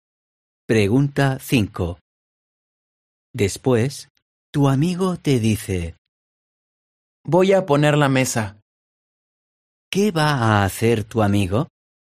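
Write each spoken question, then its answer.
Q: ¿Qué va a hacer tu amigo?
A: poner la mesa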